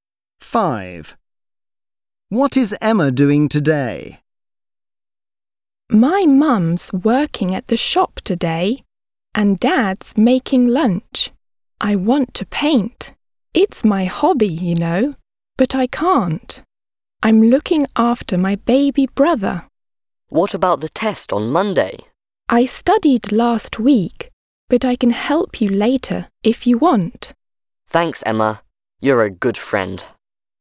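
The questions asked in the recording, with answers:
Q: What is Emma doing today?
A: looking after her baby brother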